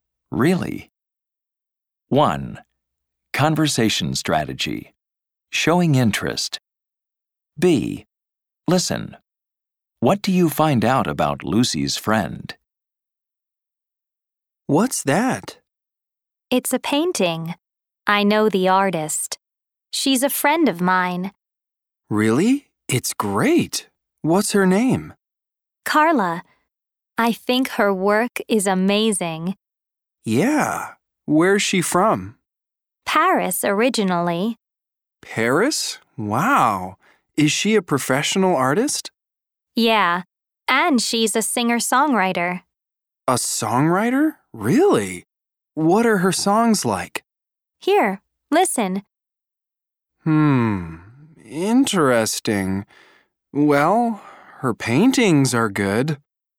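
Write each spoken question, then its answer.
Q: What do you find out about Lucy's friend?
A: Her name is Carla. She's from Paris, and she's a professional artist and a singer-songwriter.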